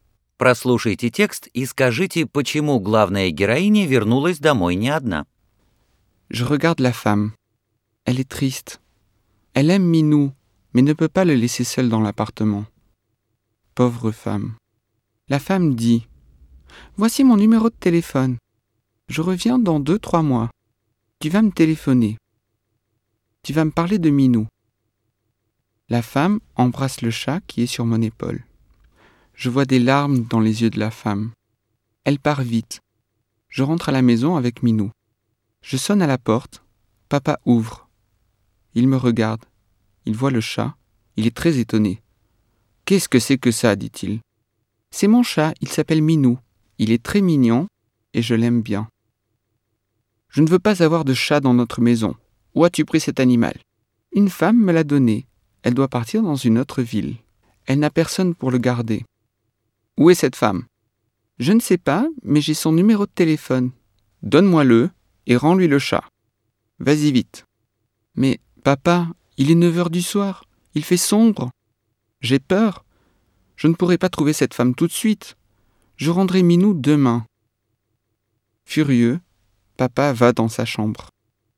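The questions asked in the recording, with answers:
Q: почему главная героиня вернулась домой не одна.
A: Женщина, уезжавшая в другой город, отдала ей своего кота Минý, потому что его не с кем было оставить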